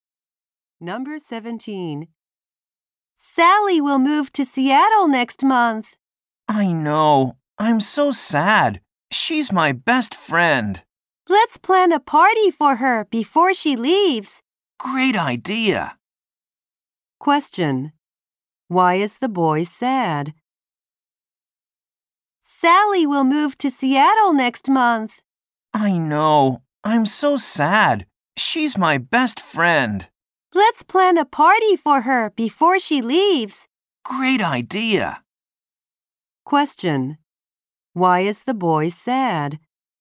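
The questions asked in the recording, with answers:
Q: Why is the boy sad?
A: His best friend Sally will move to Seattle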